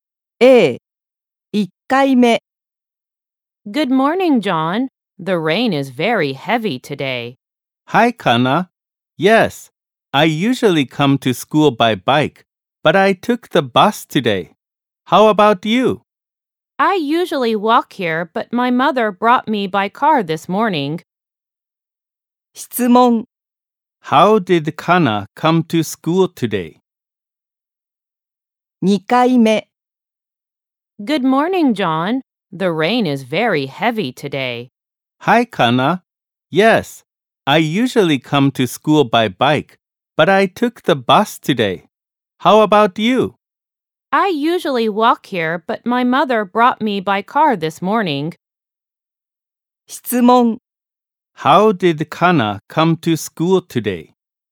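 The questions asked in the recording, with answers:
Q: How did Kana come to school today?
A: By car (her mother brought her).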